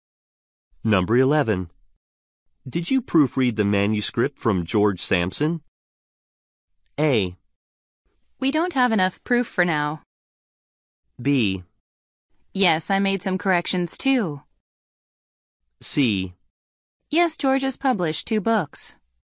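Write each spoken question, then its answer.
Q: Did you proofread the manuscript from George Sampson?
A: B: Yes, I made some corrections too.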